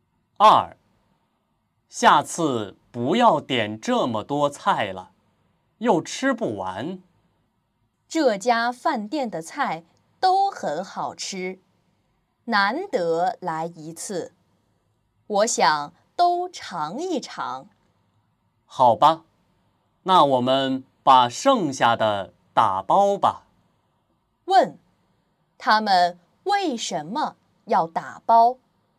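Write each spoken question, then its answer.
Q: 问,他们为什么要打包?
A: 菜没吃完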